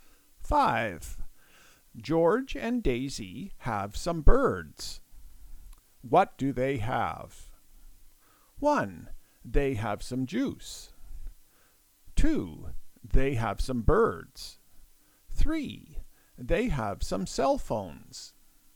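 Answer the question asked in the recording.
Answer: 2: They have some birds.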